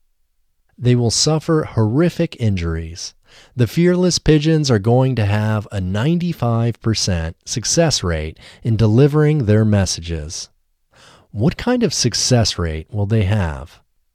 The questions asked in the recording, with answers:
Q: What kind of success rate will they have?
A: They will have a 95% success rate.